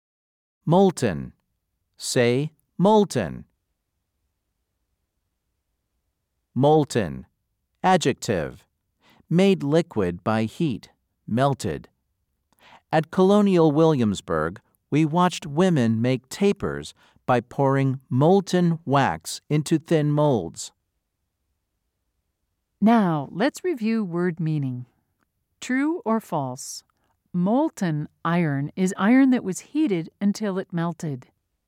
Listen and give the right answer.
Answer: If you said true, you are correct.